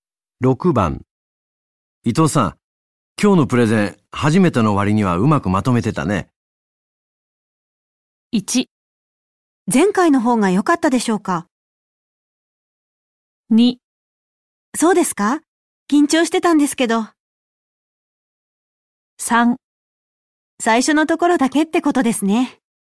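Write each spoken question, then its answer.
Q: 伊藤さん、今日のプレゼン、初めての割にはうまくまとめてたね。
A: 2: そうですか?緊張してたんですけど。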